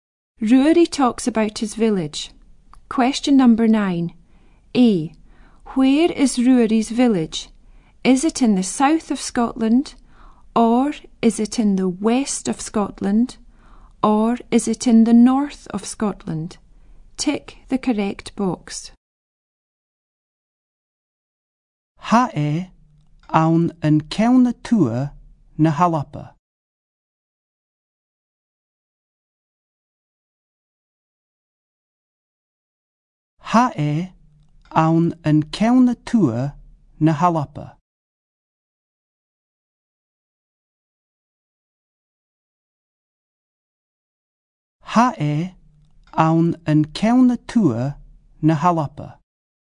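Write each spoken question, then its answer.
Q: Where is Ruairi's village?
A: In the north of Scotland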